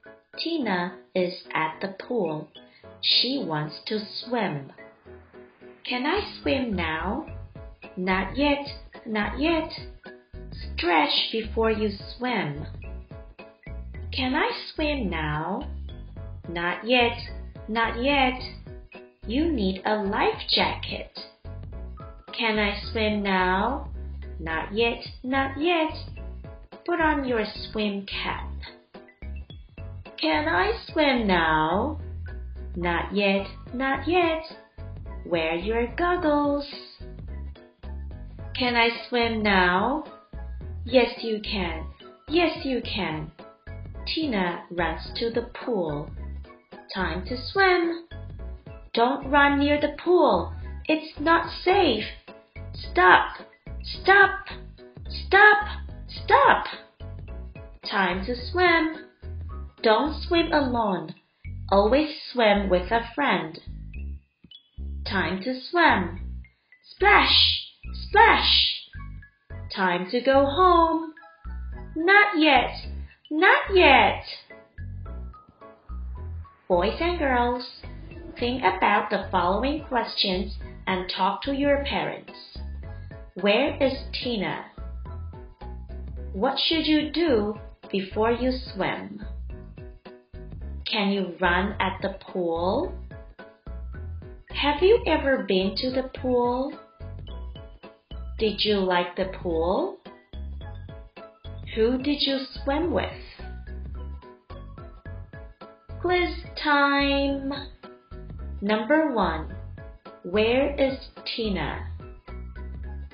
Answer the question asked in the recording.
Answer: At the pool.